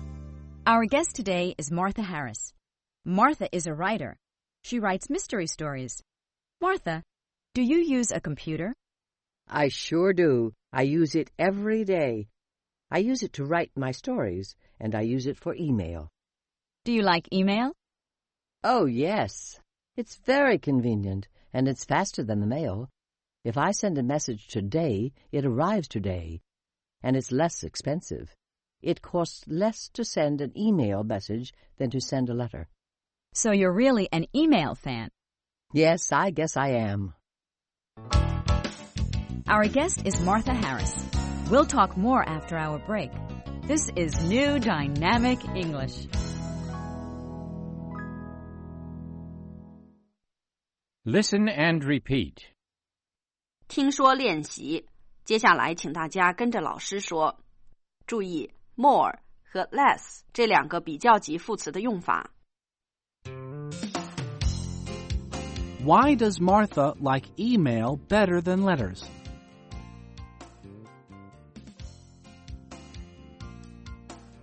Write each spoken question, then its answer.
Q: Why does Martha like email better than letters?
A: It's faster.